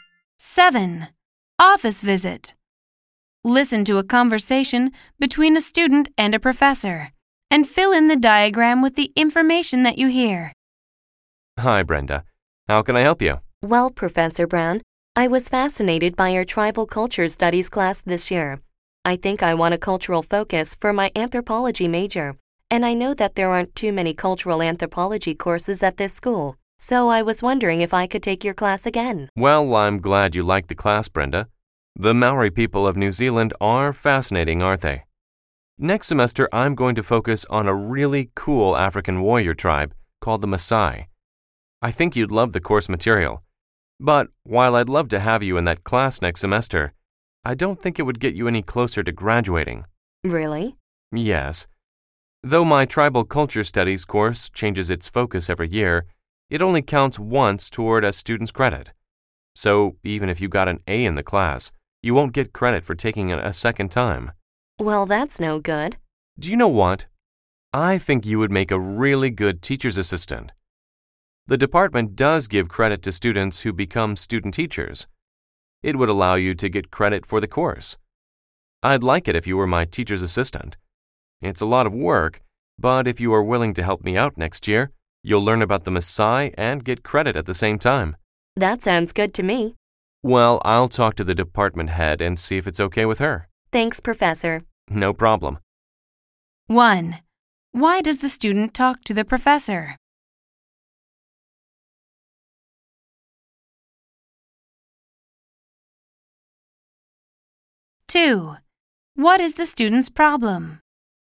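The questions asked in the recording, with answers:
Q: Why does the student talk to the professor?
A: To ask if she can take his tribal culture studies class again

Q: What is the student's problem?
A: The course only counts once for credit, so she would get no credit for taking it a second time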